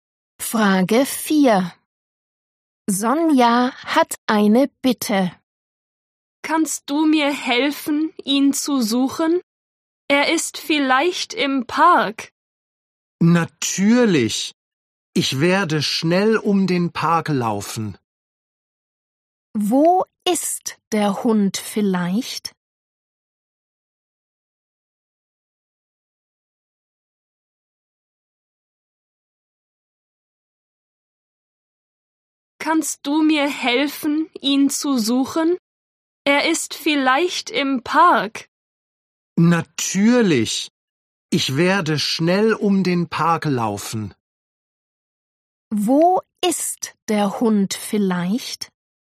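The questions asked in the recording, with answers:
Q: Wo ist der Hund vielleicht?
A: im Park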